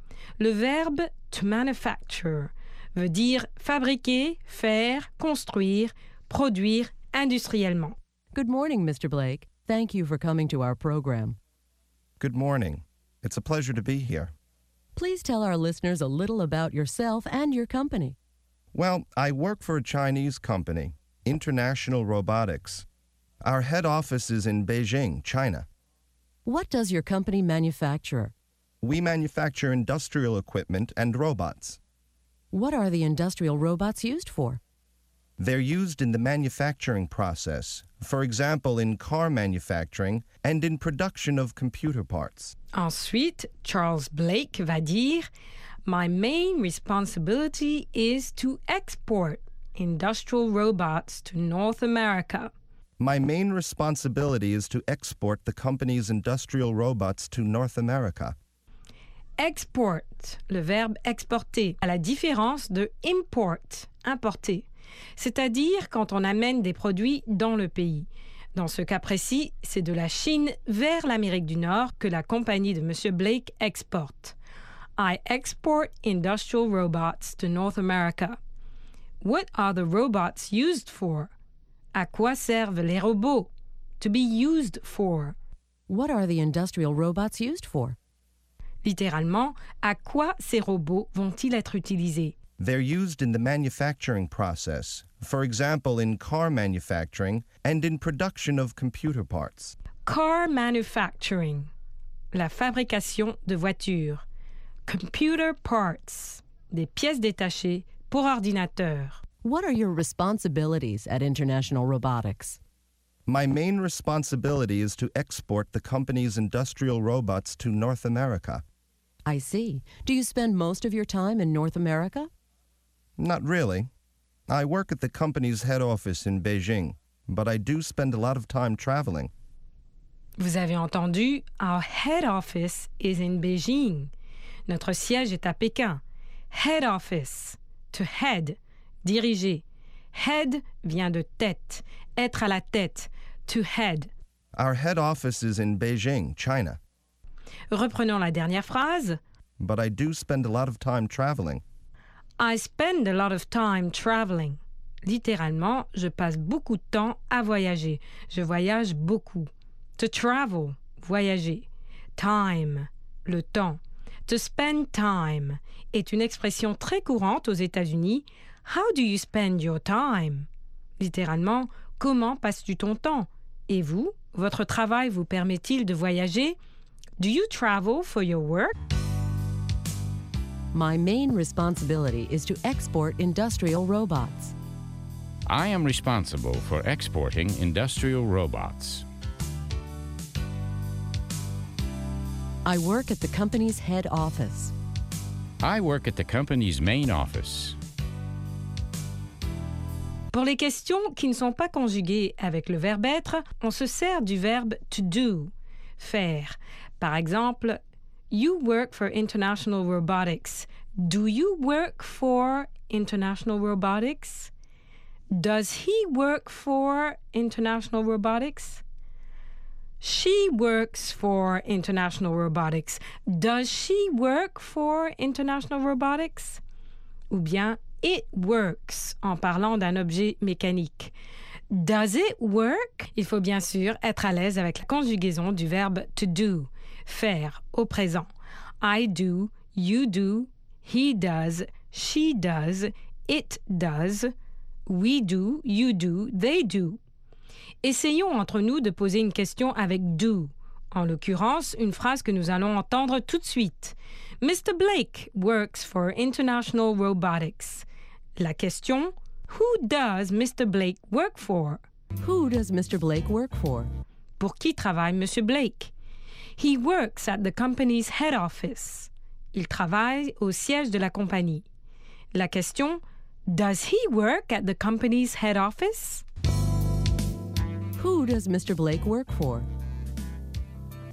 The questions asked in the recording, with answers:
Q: Who does Mr. Blake work for?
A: He works for International Robotics, a Chinese company.